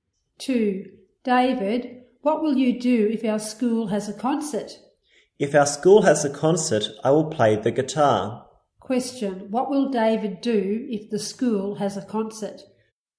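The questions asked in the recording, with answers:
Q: What will David do if the school has a concert?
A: He will play the guitar.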